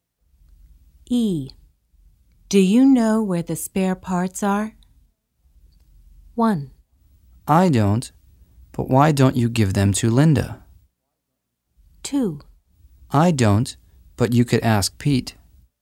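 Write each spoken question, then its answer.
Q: Do you know where the spare parts are?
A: 2: I don't, but you could ask Pete.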